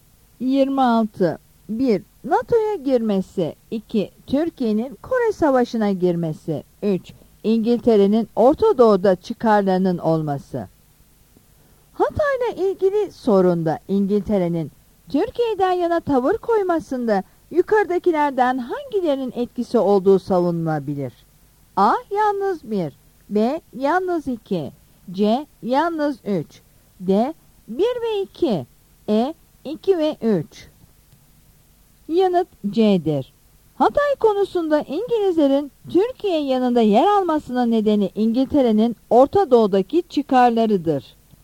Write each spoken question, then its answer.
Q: Hatay'la ilgili sorunda İngiltere'nin Türkiye'den yana tavır koymasında yukarıdakilerden hangilerinin etkisi olduğu savunulabilir?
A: Yanıt C'dir.